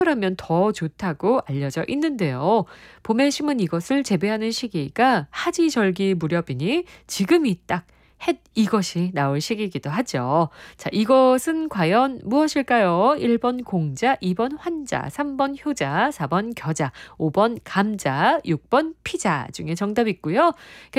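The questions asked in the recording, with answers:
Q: 자, 이것은 과연 무엇일까요?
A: 5: 감자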